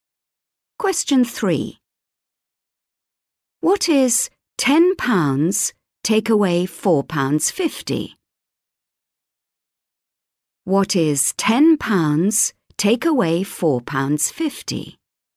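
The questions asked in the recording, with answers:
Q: What is £10 take away £4.50?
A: £5.50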